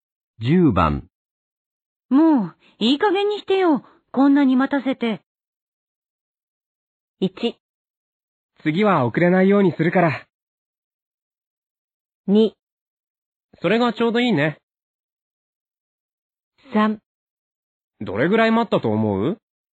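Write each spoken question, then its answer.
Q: もう、いい加減にしてよ。こんなに待たせて。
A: 1: 次は遅れないようにするから。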